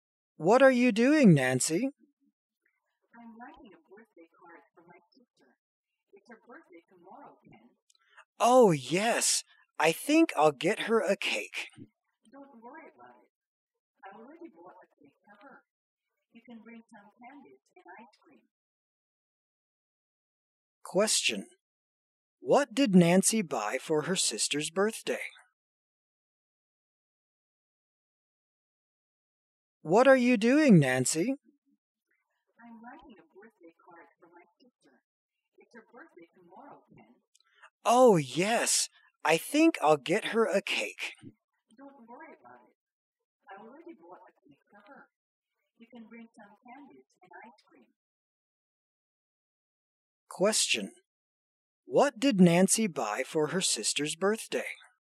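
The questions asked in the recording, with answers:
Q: What did Nancy buy for her sister's birthday?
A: A cake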